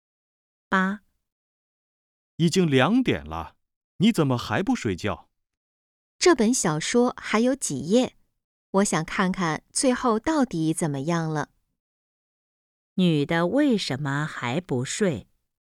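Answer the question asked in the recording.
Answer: 想看完小说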